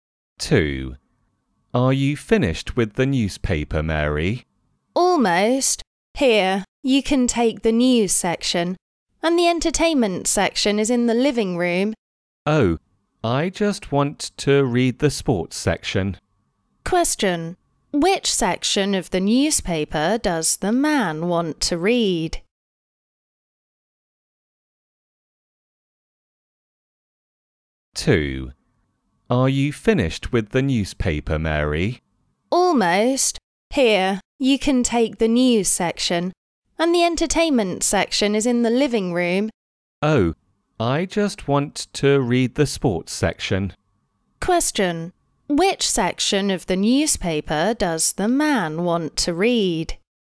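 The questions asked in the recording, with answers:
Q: Which section of the newspaper does the man want to read?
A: The sports section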